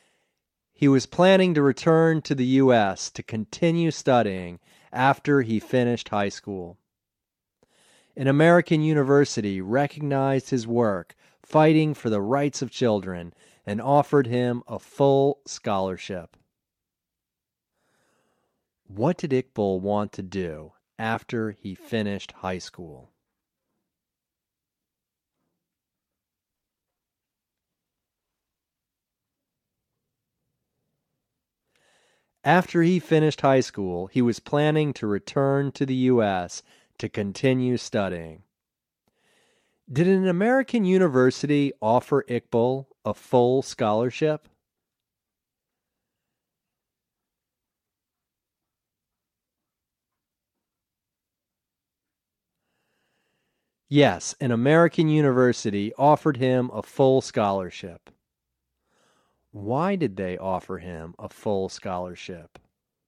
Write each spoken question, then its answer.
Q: What did Iqbal want to do after he finished high school?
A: After he finished high school, he was planning to return to the U.S. to continue studying.

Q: Why did they offer him a full scholarship?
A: They offered him a full scholarship because they recognized his work fighting for the rights of children.